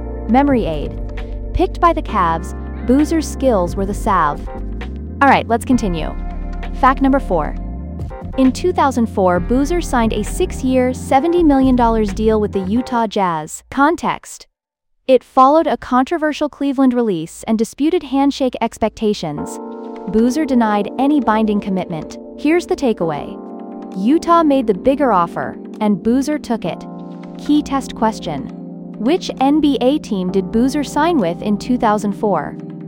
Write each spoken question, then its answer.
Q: which NBA team did Boozer sign with in 2004?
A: Utah Jazz.